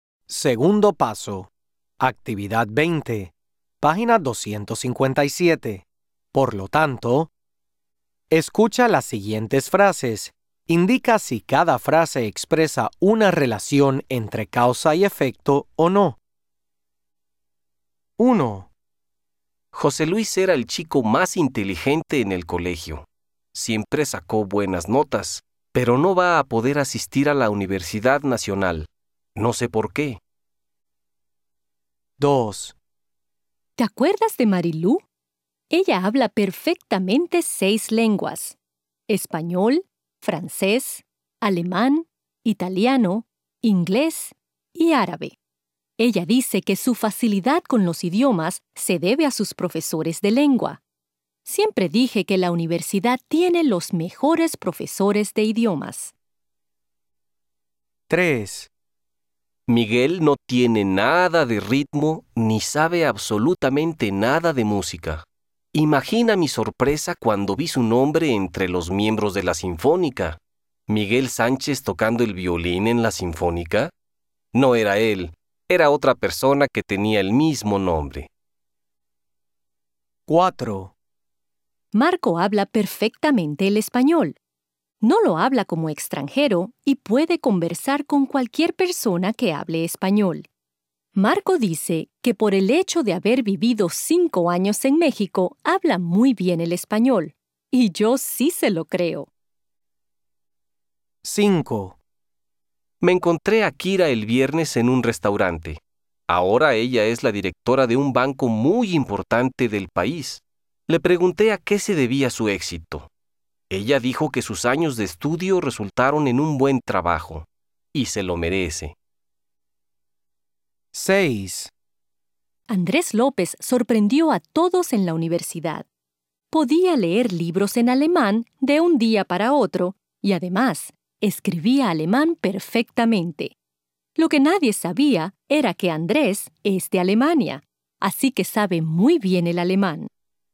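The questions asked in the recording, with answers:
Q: Indica si cada frase expresa una relación entre causa y efecto o no.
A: No

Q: Indica si cada frase expresa una relación entre causa y efecto o no.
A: Sí, causa y efecto

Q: Indica si cada frase expresa una relación entre causa y efecto o no.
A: No

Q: Indica si cada frase expresa una relación entre causa y efecto o no.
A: Sí, causa y efecto

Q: Indica si cada frase expresa una relación entre causa y efecto o no.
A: Sí, causa y efecto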